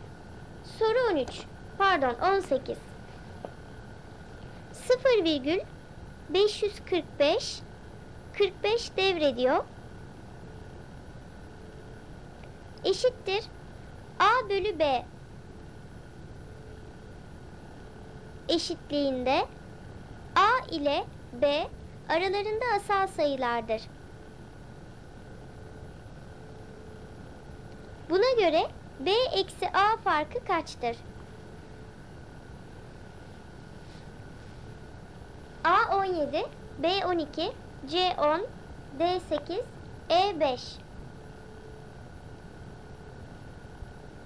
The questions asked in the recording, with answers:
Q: Buna göre B eksi A farkı kaçtır?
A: Doğru cevap E 5.